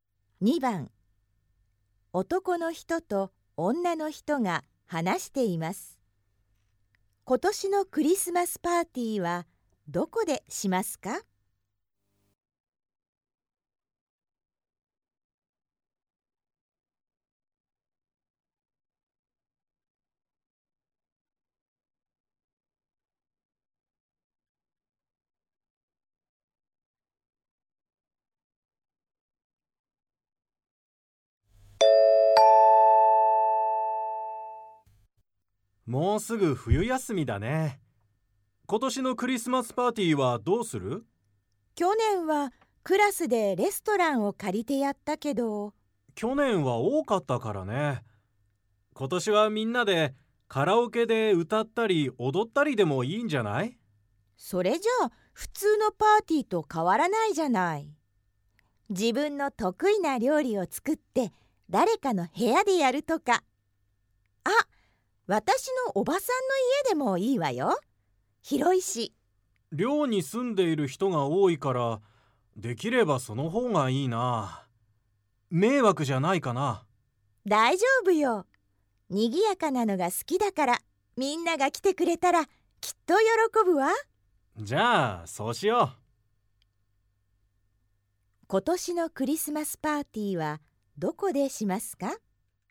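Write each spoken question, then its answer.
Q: 今年のクリスマスパーティーはどこでしますか?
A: 女の人のおばさんの家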